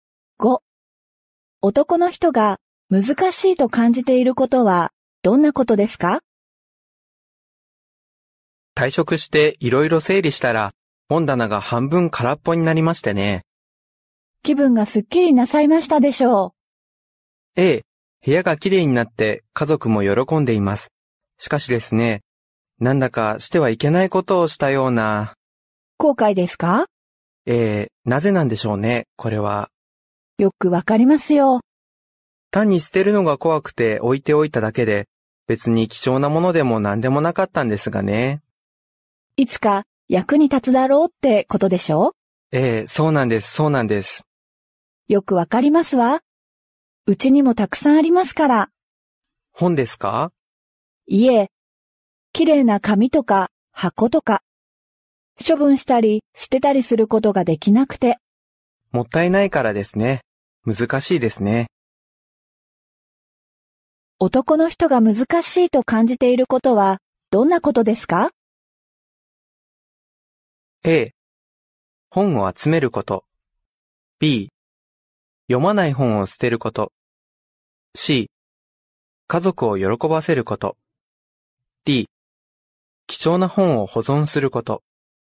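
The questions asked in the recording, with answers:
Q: 男の人が難しいと感じていることはどんなことですか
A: B: 読まない本を捨てること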